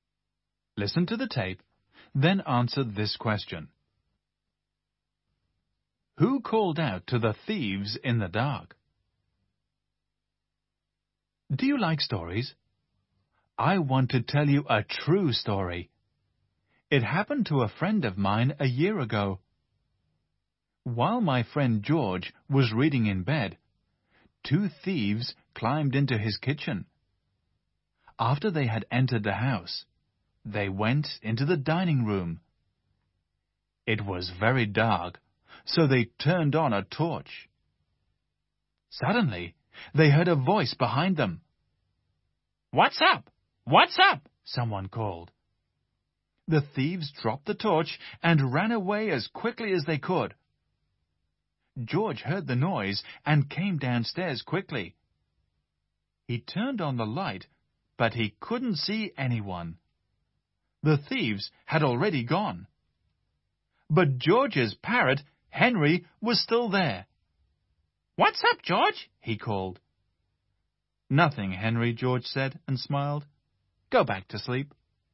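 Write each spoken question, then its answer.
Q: Who called out to the thieves in the dark?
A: George's parrot, Henry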